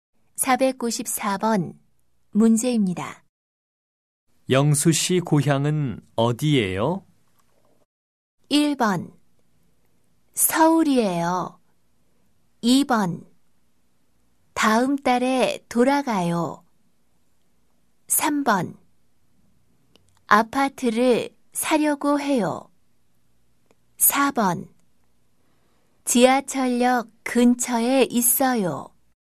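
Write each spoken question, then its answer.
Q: 영수 씨 고향은 어디예요?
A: 1: 서울이에요.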